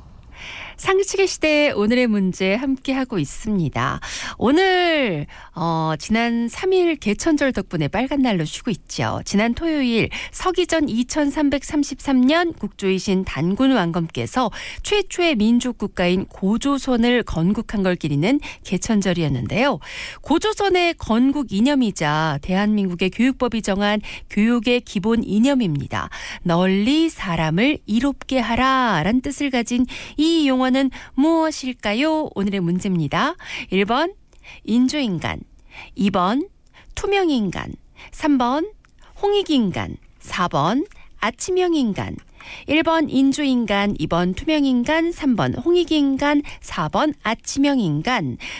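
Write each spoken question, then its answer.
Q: 널리 사람을 이롭게 하라 라는 뜻을 가진 이 용어는 무엇일까요?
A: 3번: 홍익인간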